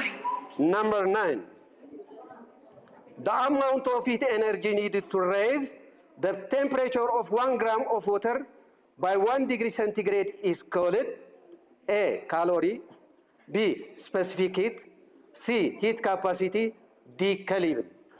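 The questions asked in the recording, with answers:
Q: The amount of heat energy needed to raise the temperature of 1 gram of water by 1 degree centigrade is called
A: A: calorie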